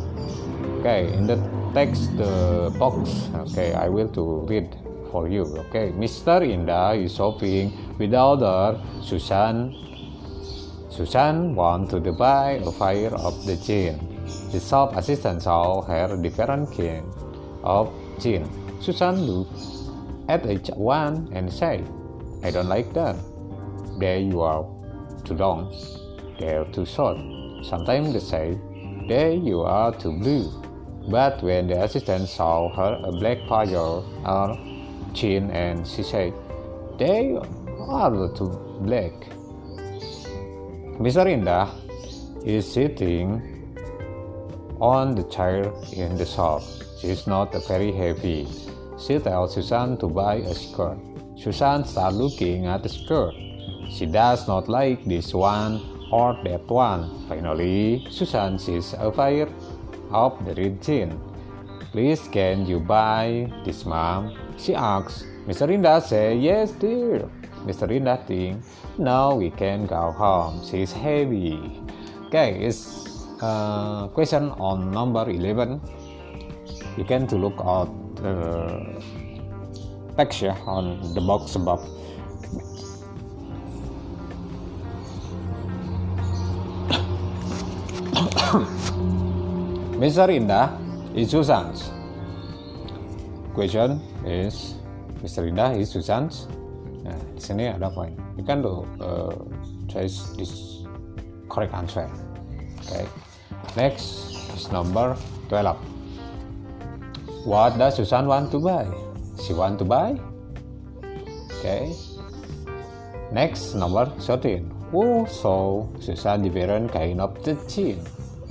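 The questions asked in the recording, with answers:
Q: Inda is Susan's.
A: mother

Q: What does Susan want to buy?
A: a pair of jeans

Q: Who saw Susan different kind of the chin?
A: the shop assistant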